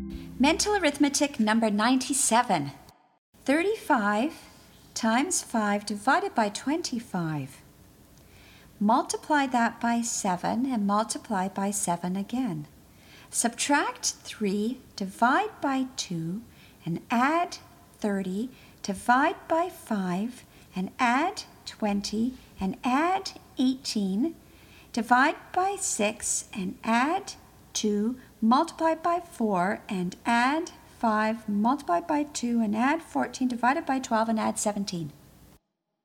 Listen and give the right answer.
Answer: And the answer is 29.